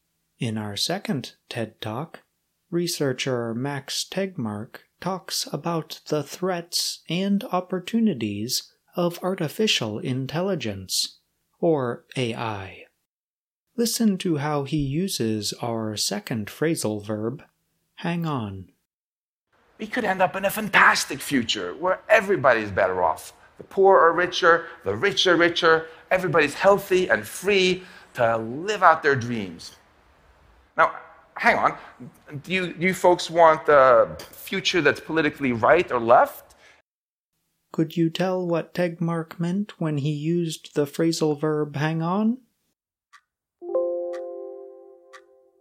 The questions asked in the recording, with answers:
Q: Could you tell what Tegmark meant when he used the phrasal verb hang on?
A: hang on means wait for a short time